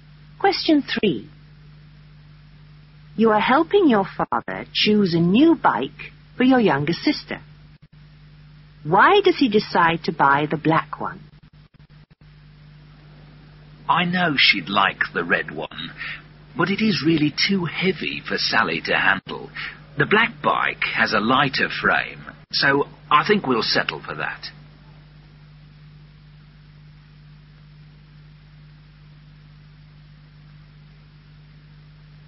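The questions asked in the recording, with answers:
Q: Why does he decide to buy the black one?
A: It has a lighter frame (the red one is too heavy)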